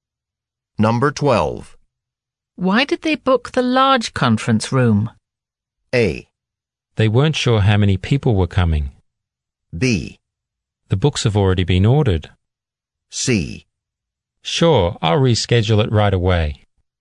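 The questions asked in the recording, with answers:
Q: Why did they book the large conference room?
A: A: They weren't sure how many people were coming.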